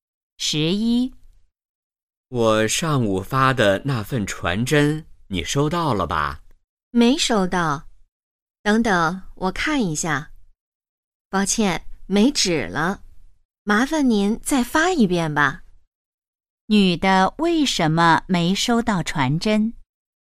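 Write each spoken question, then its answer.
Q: 女的为什么没收到传真?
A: 传真机没纸了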